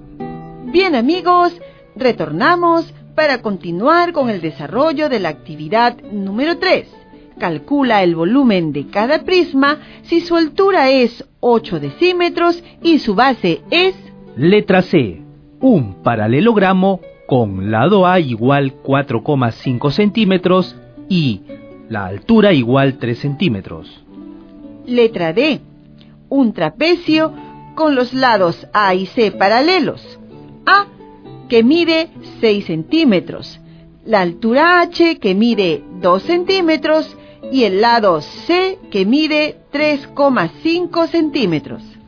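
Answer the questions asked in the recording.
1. 1080 cm3 (área de la base 13,5 cm2 × 80 cm)
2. 760 cm3 (área de la base 9,5 cm2 × 80 cm)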